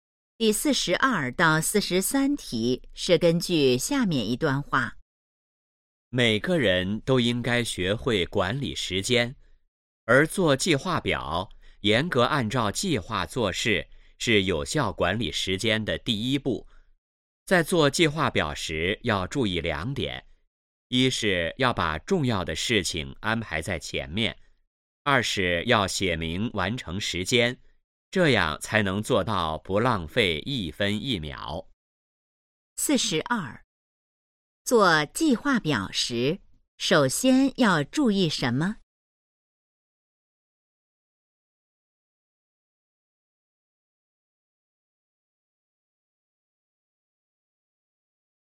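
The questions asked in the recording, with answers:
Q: 做计划表时,首先要注意什么?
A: 把重要的事情安排在前面

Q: 这段话主要谈的是什么?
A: 如何管理时间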